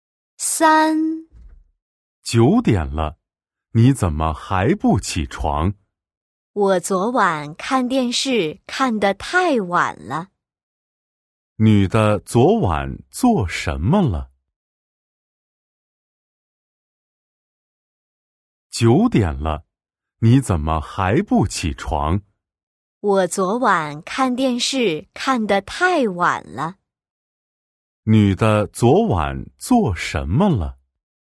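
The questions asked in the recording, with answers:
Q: 女的昨晚做什么了?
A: 看电视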